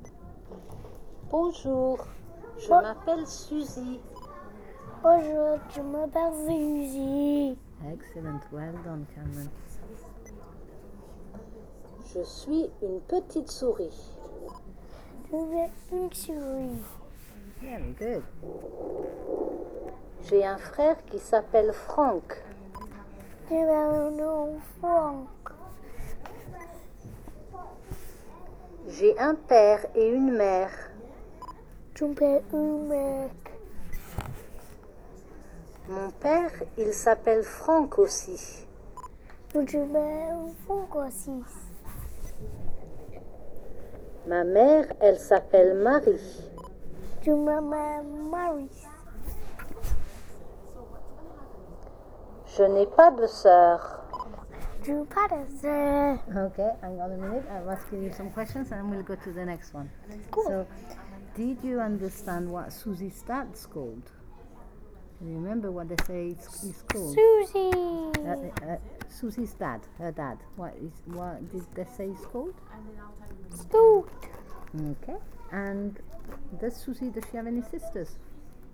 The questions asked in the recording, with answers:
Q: And does Susie, does she have any sisters?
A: No.